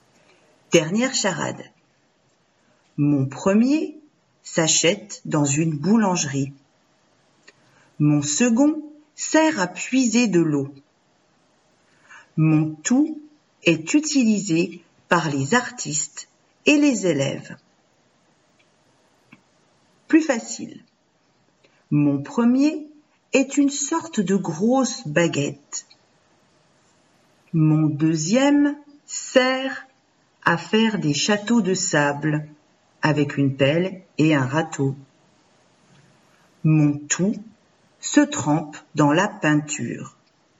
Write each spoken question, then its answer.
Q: Mon tout se trempe dans la peinture.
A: La réponse est pinceau.